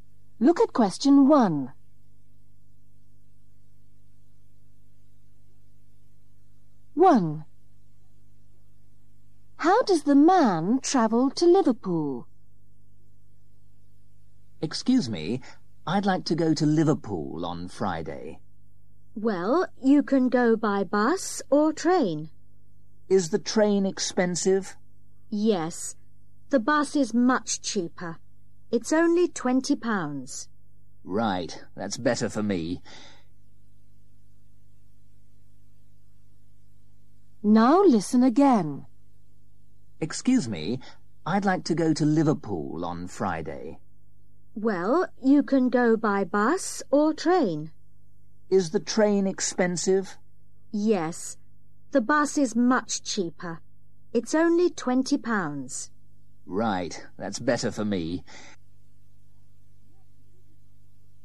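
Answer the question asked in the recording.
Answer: By bus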